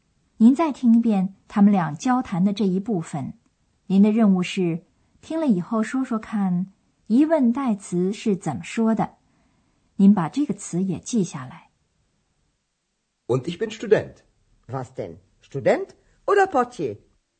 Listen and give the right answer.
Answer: 找的第三个词是疑问代词 was, 什么?